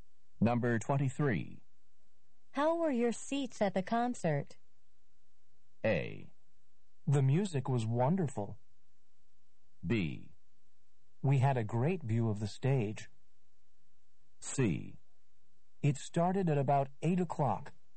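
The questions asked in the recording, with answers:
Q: How were your seats at the concert?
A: B: We had a great view of the stage.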